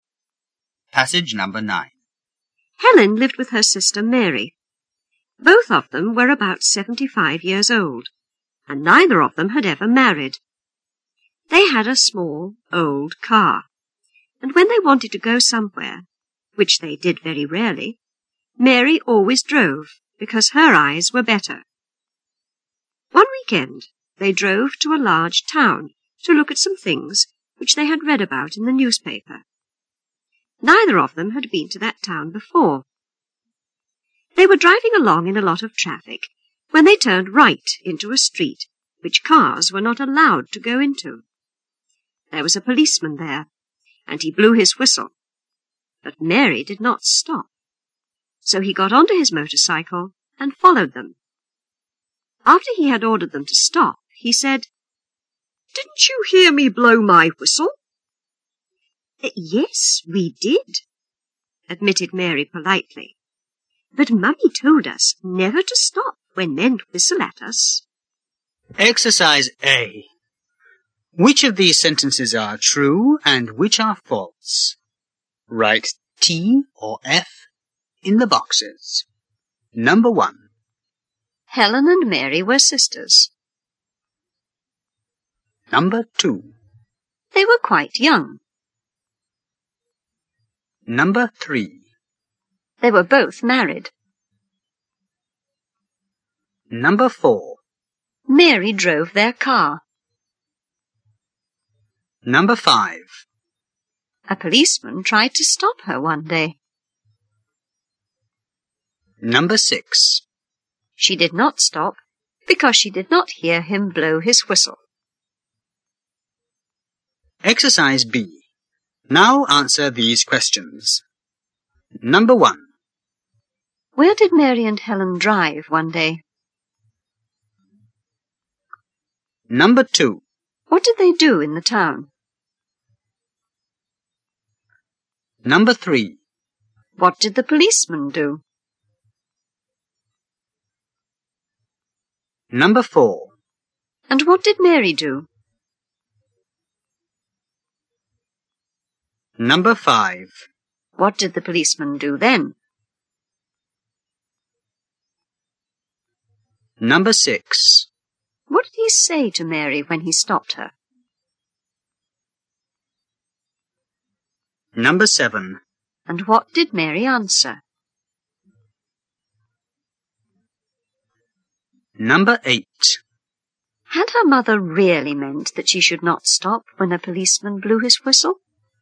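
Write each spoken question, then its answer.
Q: Helen and Mary were sisters.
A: True

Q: They were quite young.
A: False

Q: They were both married.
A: False

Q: Mary drove their car.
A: True

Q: A policeman tried to stop her one day.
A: True

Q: She did not stop because she did not hear him blow his whistle.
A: False

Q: Where did Mary and Helen drive one day?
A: To a large town

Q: What did the policeman do?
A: He blew his whistle

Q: And what did Mary do?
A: She did not stop

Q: What did the policeman do then?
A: He got onto his motorcycle and followed them

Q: What did he say to Mary when he stopped her?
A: Didn't you hear me blow my whistle?

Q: And what did Mary answer?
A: Yes, but Mummy told us never to stop when men whistle at us

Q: Had her mother really meant that she should not stop when a policeman blew his whistle?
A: No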